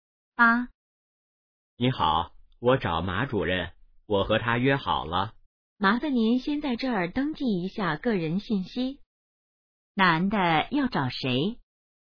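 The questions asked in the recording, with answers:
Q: 男的要找谁?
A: 马主任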